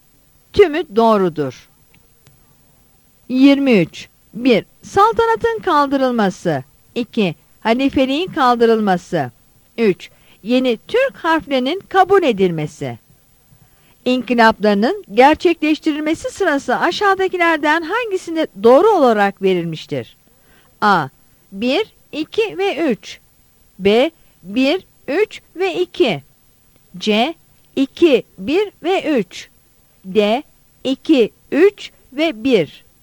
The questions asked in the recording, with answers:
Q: İnkılaplarının gerçekleştirilmesi sırası aşağıdakilerden hangisinde doğru olarak verilmiştir?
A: Yanıt A'dır.